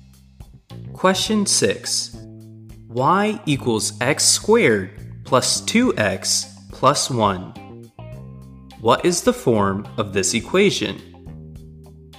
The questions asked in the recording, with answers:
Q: What is the form of this equation?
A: This equation is in the standard form.